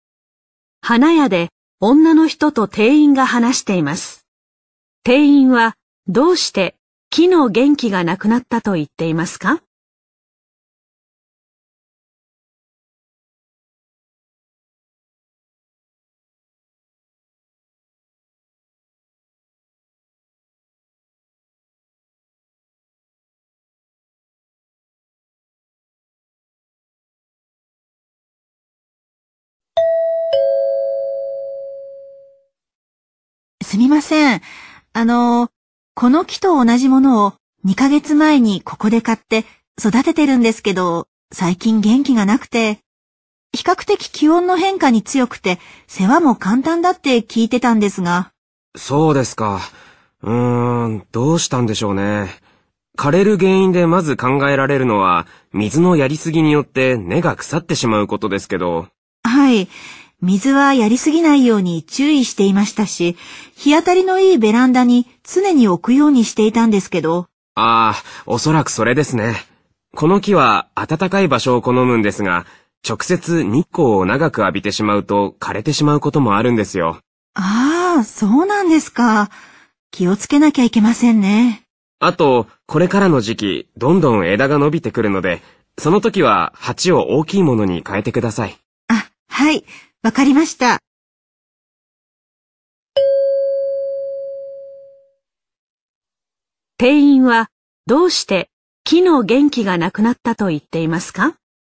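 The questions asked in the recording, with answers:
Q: 店員はどうして木の元気がなくなったと言っていますか?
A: 直接日光を長く浴びたから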